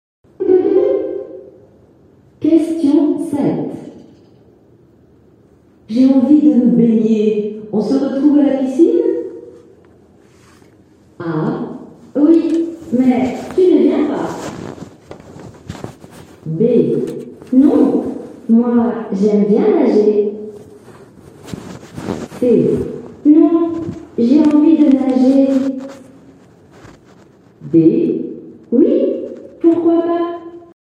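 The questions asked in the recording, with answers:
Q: J'ai envie de me baigner. On se retrouve à la piscine?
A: D: Oui, pourquoi pas?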